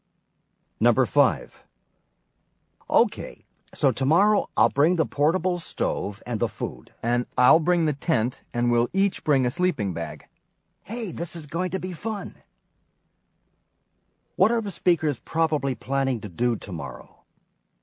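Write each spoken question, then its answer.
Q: What are the speakers probably planning to do tomorrow?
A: Go camping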